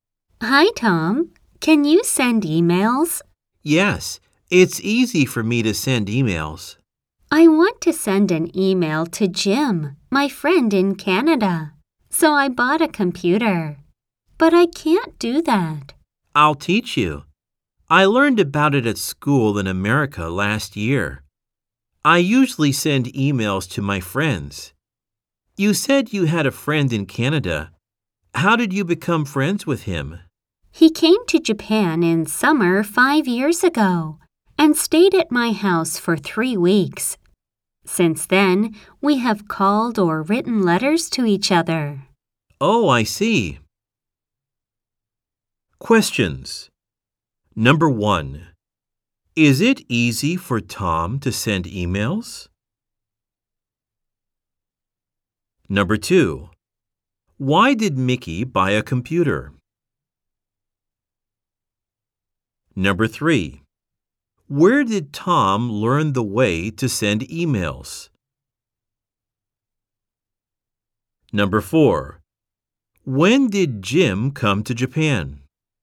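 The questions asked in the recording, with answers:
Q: is it easy for Tom to send emails?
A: Yes, it is.

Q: why did Mickey buy a computer?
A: To send an email to Jim, her friend in Canada.

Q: where did Tom learn the way to send emails?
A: At school in America.

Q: when did Jim come to Japan?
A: In summer five years ago.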